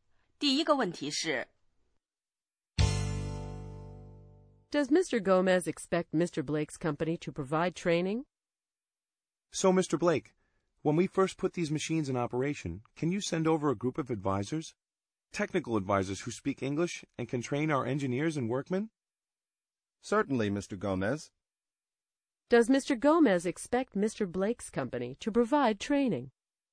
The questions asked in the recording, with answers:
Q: Does Mr. Gomez expect Mr. Blake's company to provide training?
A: Yes, he does.He expects the company to send a group of technical advisors to provide training.